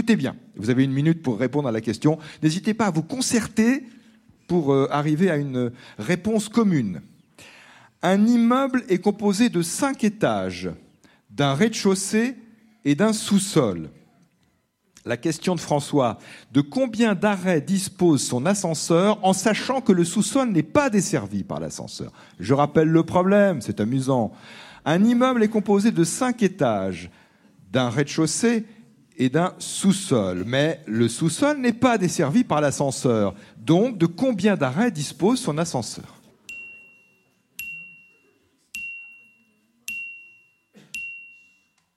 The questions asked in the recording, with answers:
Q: La question de François, de combien d'arrêts dispose son ascenseur en sachant que le sous-sol n'est pas desservi par l'ascenseur?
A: Et donc, 6 arrêts, les 5 étages, plus le rez-de-chaussée.